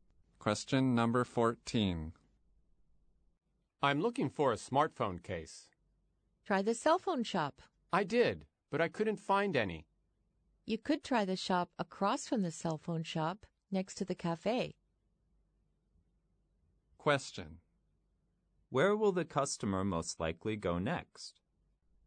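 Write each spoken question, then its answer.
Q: Where will the customer most likely go next?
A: The shop across from the cell phone shop, next to the cafe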